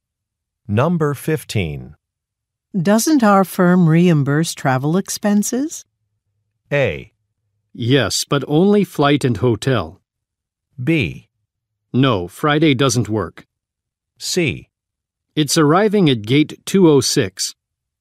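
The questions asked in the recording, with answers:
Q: Doesn't our firm reimburse travel expenses?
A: A: Yes, but only flight and hotel.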